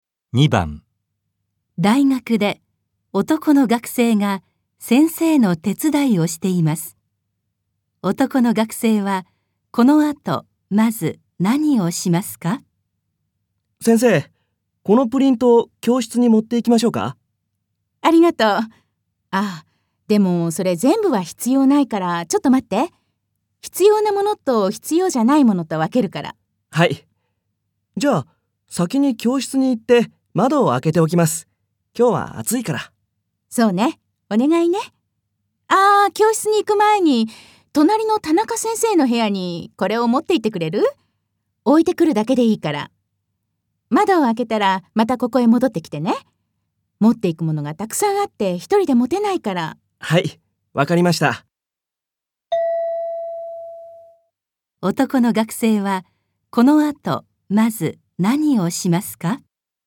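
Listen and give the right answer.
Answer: 隣の田中先生の部屋に物を持って行く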